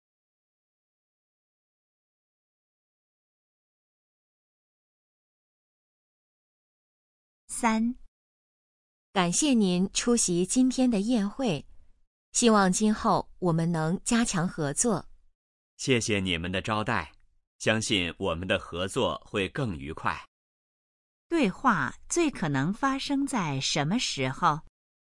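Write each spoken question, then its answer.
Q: 对话最可能发生在什么时候?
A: 宴会上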